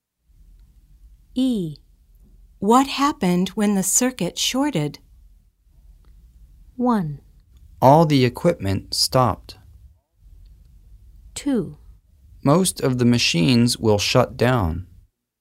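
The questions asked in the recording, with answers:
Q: What happened when the circuit shorted?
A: 1: All the equipment stopped.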